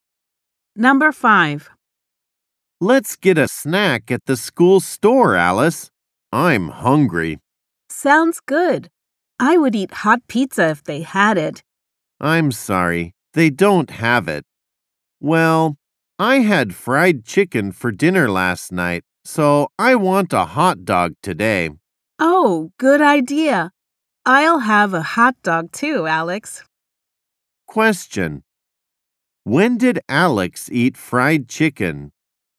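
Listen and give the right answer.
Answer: Last night, for dinner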